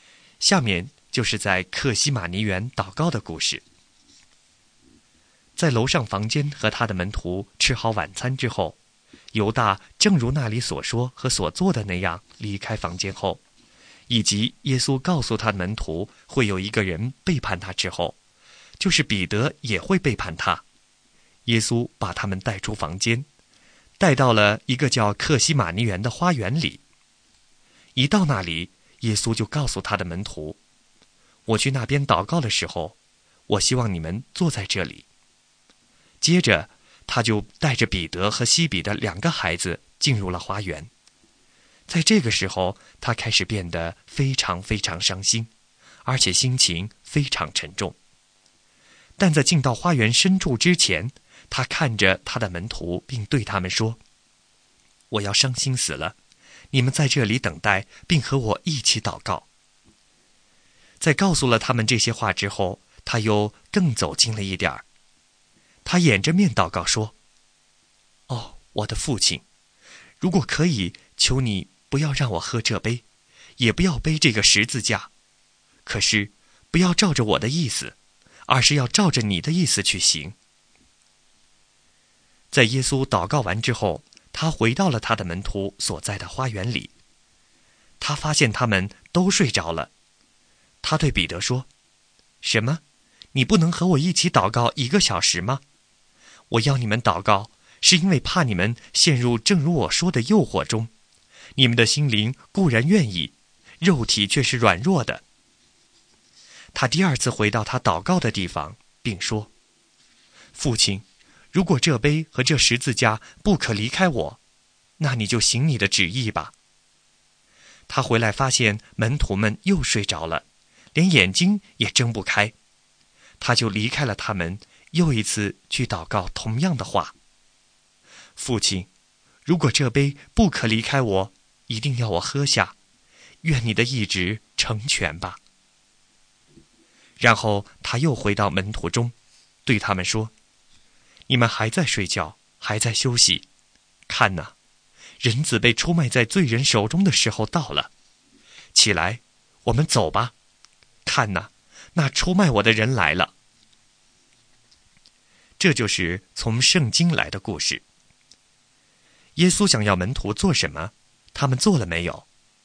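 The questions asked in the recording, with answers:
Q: 耶稣想要门徒做什么,他们做了没有?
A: 耶稣要门徒在那里等待并和他一起祷告;他们没有做到,而是睡着了。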